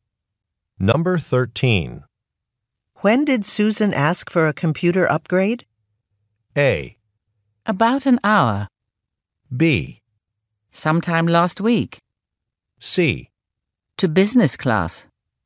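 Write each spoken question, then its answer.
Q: When did Susan ask for a computer upgrade?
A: B: Sometime last week.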